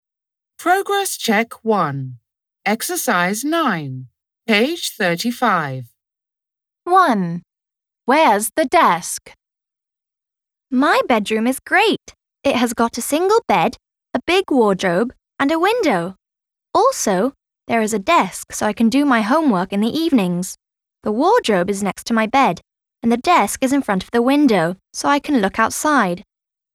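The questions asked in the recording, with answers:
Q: Where's the desk?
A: In front of the window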